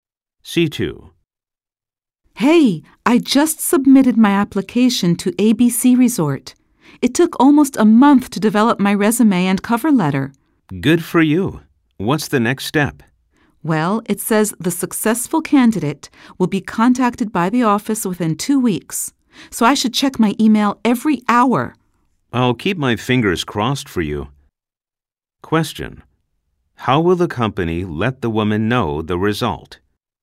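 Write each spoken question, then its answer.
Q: How will the company let the woman know the result?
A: By email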